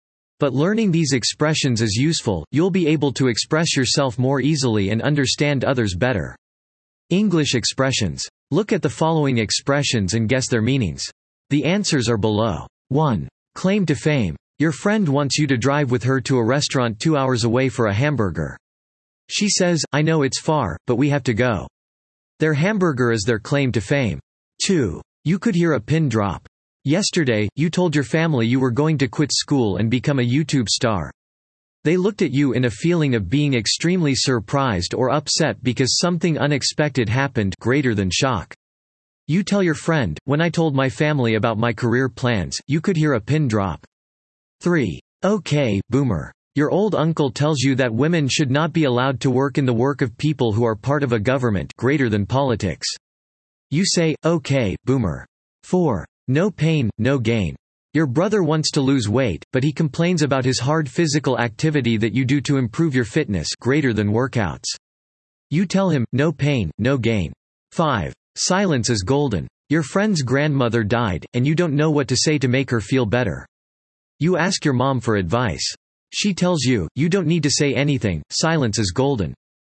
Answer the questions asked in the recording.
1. Claim to fame. This is a reason why someone or something is famous.
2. This describes complete silence, a situation so silent that you would be able to hear a tiny pin drop on the ground.
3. Okay, boomer. This is said to older people called baby boomers, born between 1946 and 1964.
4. No pain, no gain. This expression means it's necessary to work hard if you want to succeed.
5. Silence is golden. This means that it is often better to remain silent than to speak, sometimes words aren't needed.